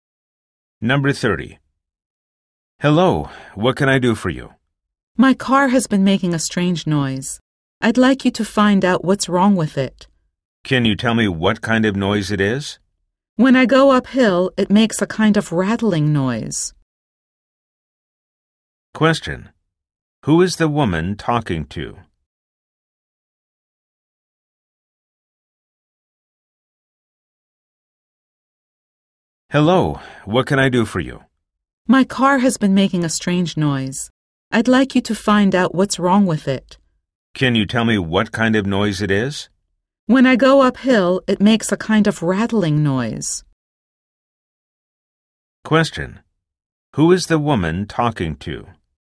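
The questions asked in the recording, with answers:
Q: Who is the woman talking to?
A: A car mechanic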